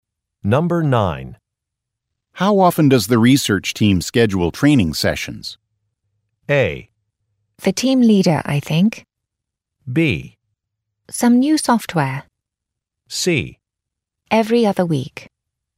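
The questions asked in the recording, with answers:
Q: How often does the research team schedule training sessions?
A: C: Every other week.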